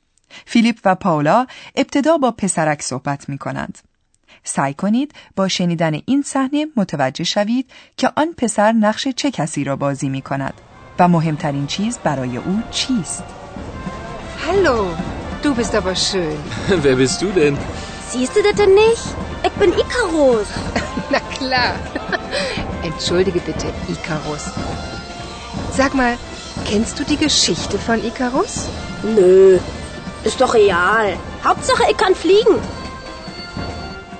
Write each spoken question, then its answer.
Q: سعی کنید با شنیدن این صحنه متوجه شوید که آن پسر نقش چه کسی را بازی می کند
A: این پسر نقش ایکاروس را بازی می کند که یکی از چهره های اساطیر یونانی است.

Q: و مهمترین چیز برای او چیست.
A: و این پسر نیز همچون ایکاروس، فلیگن یا پرواز کردن را مهمترین چیز می داند.